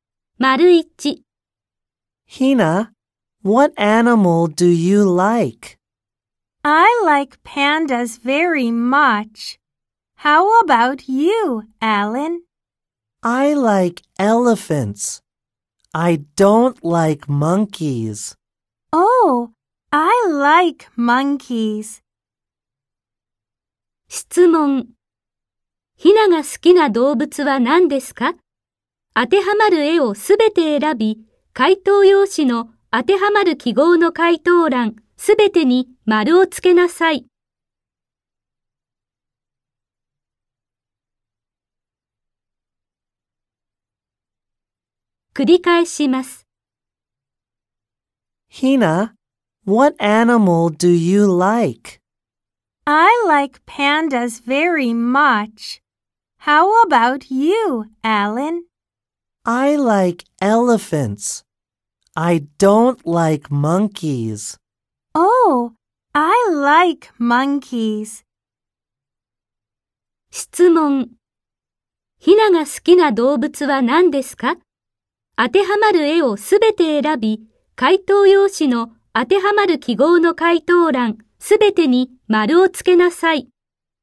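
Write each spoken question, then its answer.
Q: ひなが好きな動物は何ですか?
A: パンダとサル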